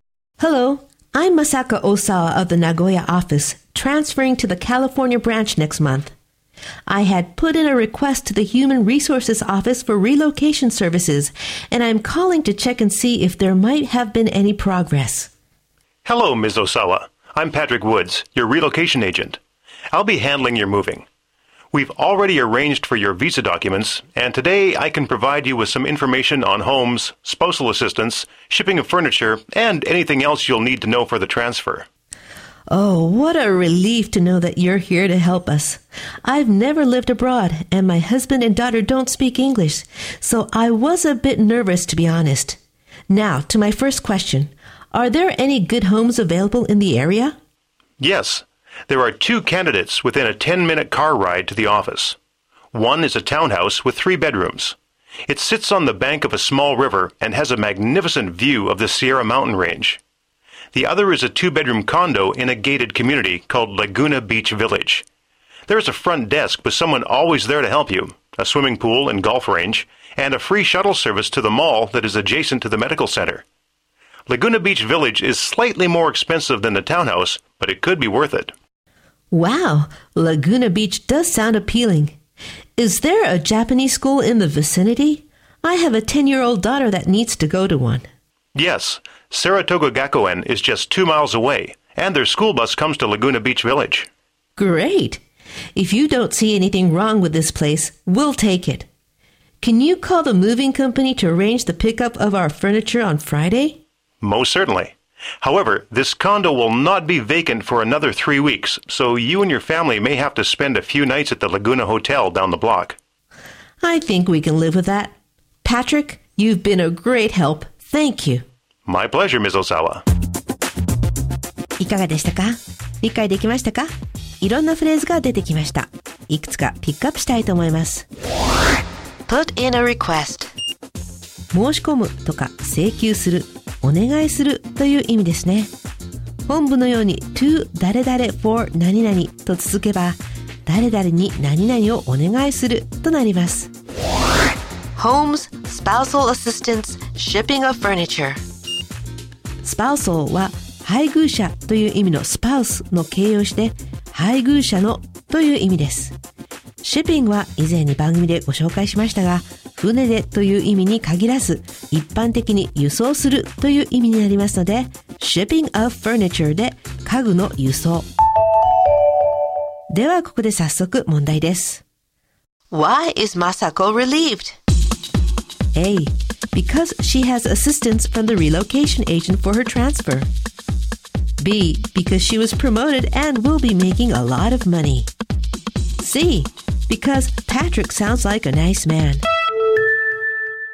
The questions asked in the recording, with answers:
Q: Why is Masako relieved?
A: 正解は、A、彼女の転勤に伴う引っ越し業務の代行を行う担当者からの手助けがあるからですね。